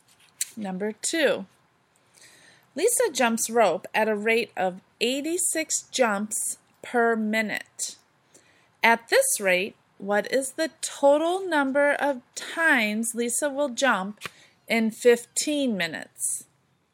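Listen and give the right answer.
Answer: 1,290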